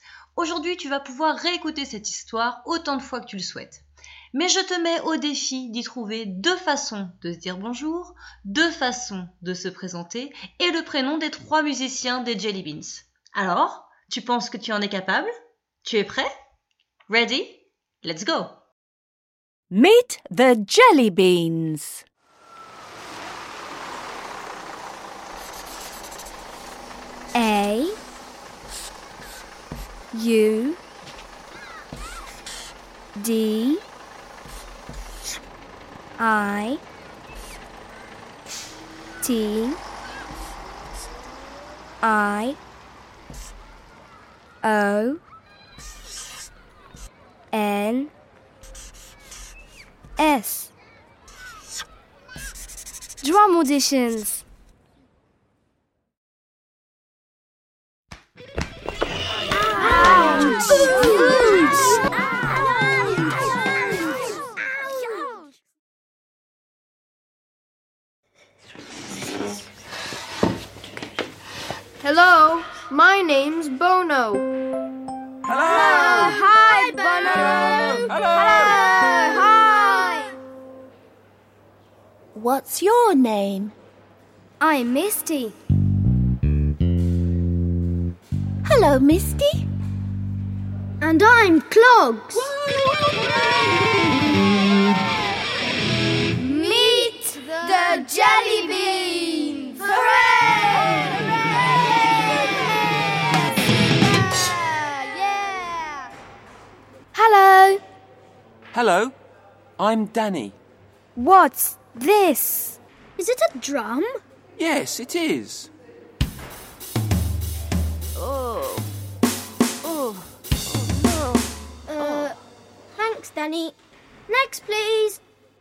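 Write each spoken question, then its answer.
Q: deux façons de se dire bonjour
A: Hello et Hi

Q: deux façons de se présenter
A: My name's ... et I'm ...

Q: le prénom des trois musiciens des Jelly Beans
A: Bono, Misty et Clogs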